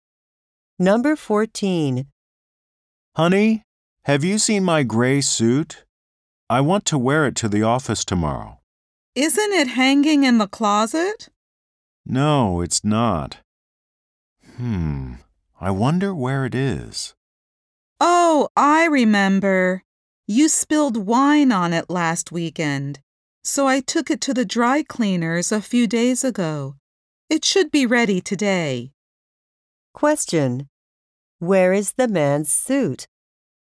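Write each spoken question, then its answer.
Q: Where is the man's suit?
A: At the dry cleaners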